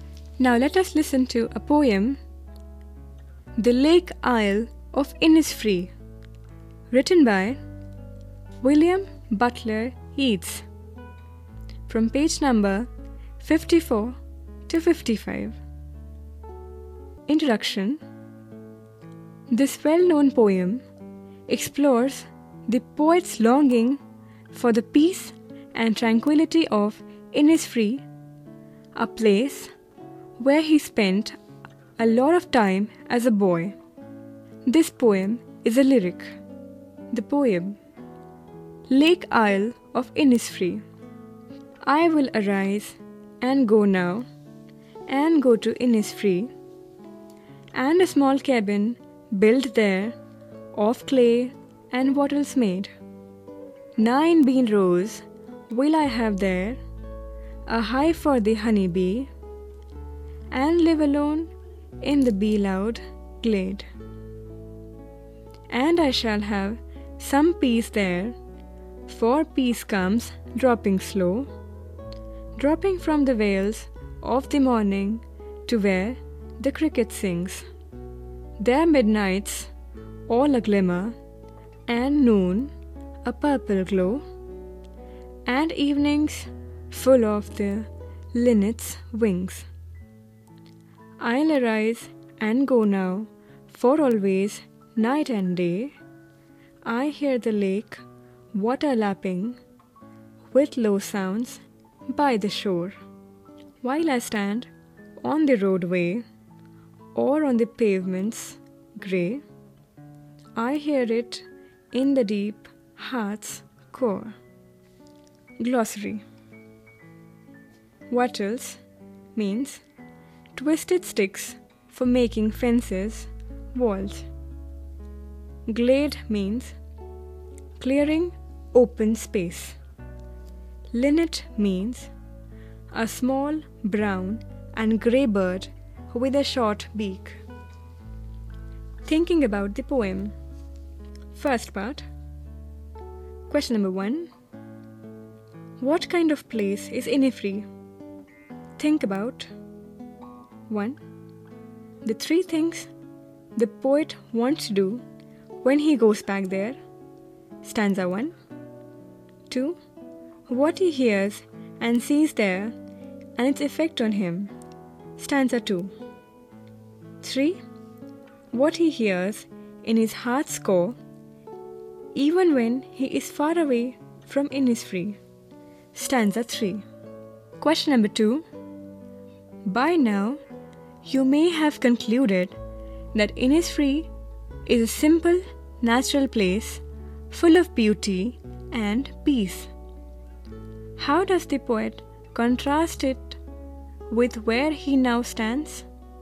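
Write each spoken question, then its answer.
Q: How does the poet contrast it with where he now stands?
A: He now stands on the roadway or grey pavements of a city, unlike peaceful, natural Innisfree, but he still hears its lake water in his heart's core.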